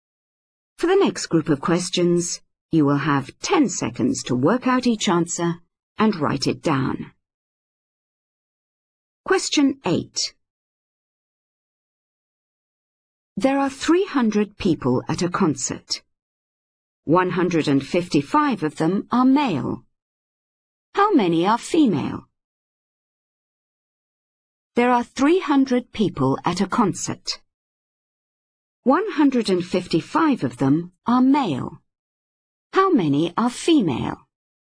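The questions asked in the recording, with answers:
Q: 155 of them are male. How many are female?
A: 145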